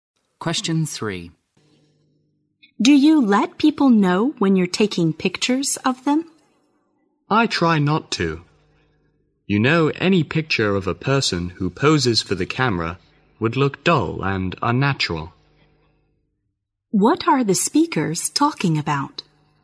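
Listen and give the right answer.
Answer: Taking natural pictures of people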